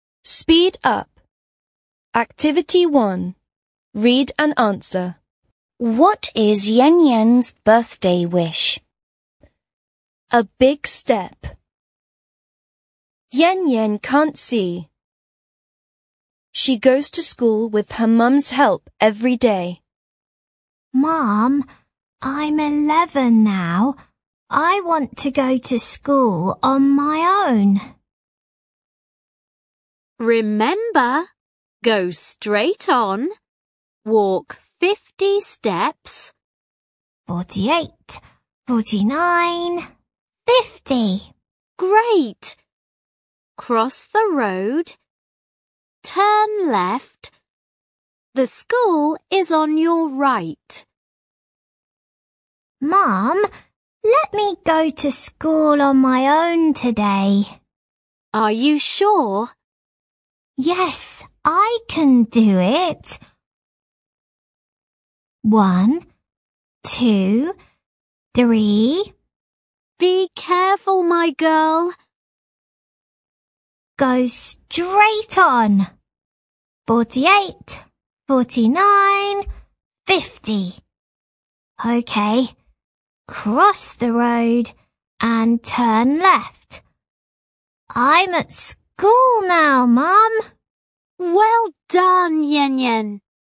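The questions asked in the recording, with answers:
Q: What is Yen Yen's birthday wish?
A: To go to school on her own.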